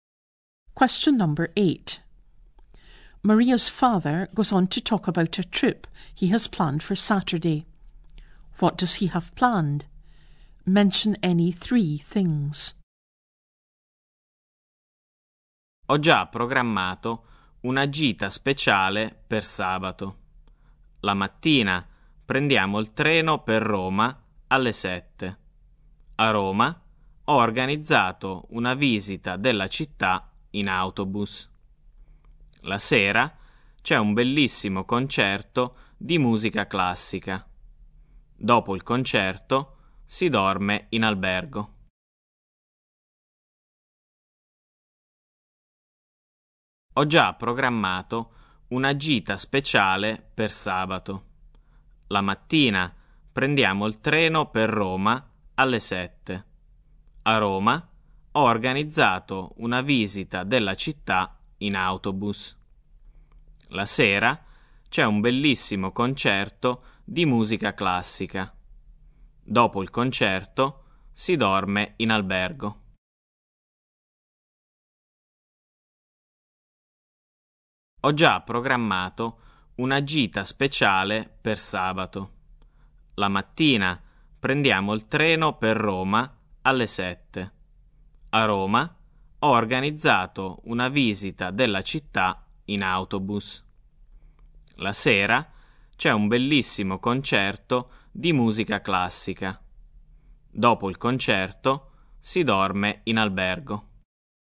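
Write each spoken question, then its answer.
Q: What does he have planned?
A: The 7 o'clock train to Rome in the morning; a bus tour of the city; a classical music concert in the evening; staying the night in a hotel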